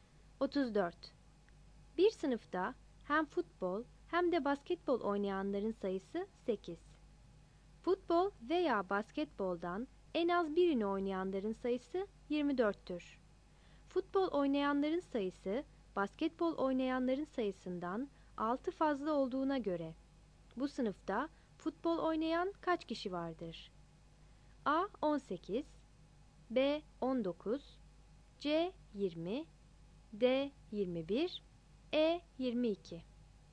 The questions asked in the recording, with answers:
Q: Futbol oynayanların sayısı basketbol oynayanların sayısından 6 fazla olduğuna göre bu sınıfta futbol oynayan kaç kişi vardır?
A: 34 B